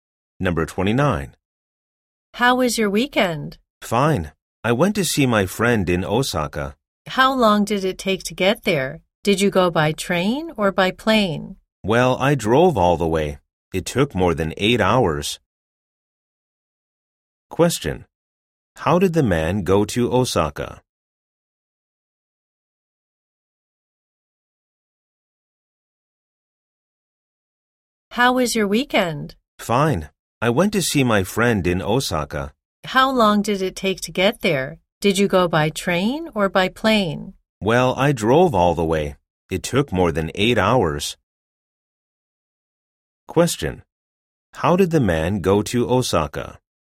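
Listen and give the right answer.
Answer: He drove (by car).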